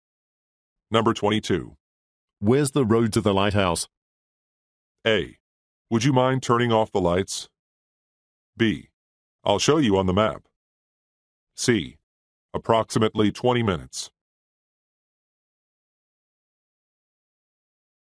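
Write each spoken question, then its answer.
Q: Where's the road to the lighthouse?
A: B: I'll show you on the map.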